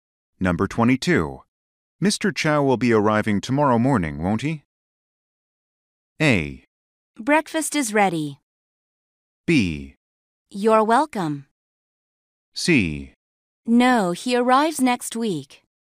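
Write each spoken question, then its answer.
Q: Mr. Chow will be arriving tomorrow morning, won't he?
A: C: No, he arrives next week.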